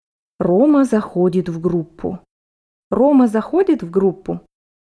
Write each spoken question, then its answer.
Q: Рома заходит в группу?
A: Да, он заходит в группу.